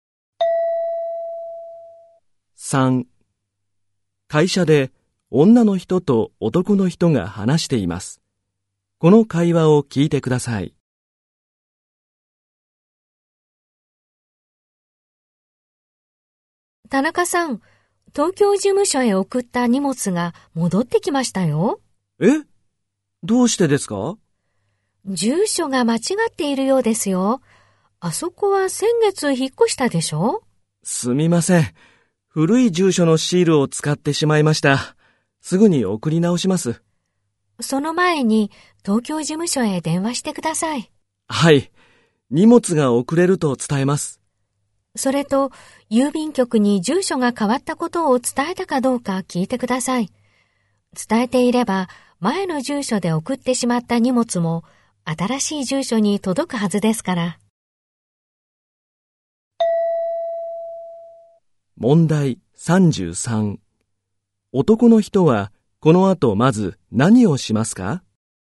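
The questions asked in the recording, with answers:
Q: 男の人はこの後まず何をしますか?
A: 東京事務所へ電話する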